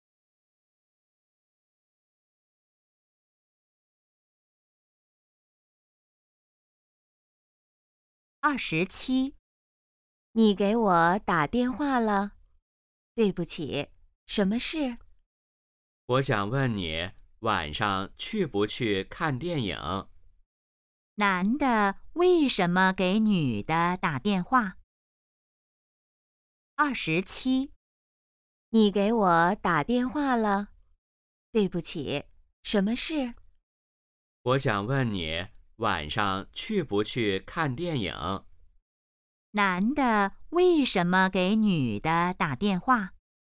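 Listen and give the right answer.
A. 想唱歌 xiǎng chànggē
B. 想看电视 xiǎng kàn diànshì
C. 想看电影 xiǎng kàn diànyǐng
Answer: C. 想看电影 xiǎng kàn diànyǐng

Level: HSK2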